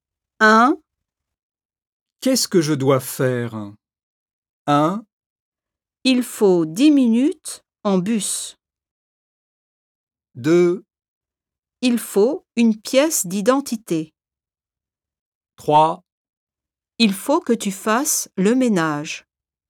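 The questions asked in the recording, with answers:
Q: Qu'est-ce que je dois faire?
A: 3: Il faut que tu fasses le ménage.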